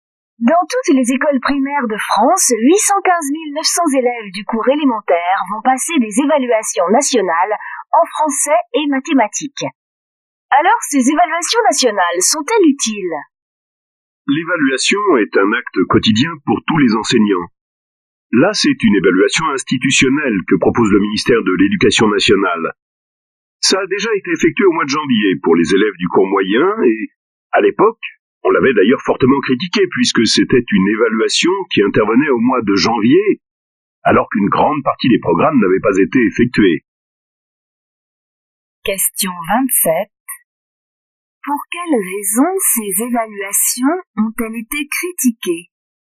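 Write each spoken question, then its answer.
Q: Pour quelles raisons ces évaluations ont-elles été critiquées ?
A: Parce qu'elles avaient lieu en janvier, alors qu'une grande partie des programmes n'avait pas encore été faite.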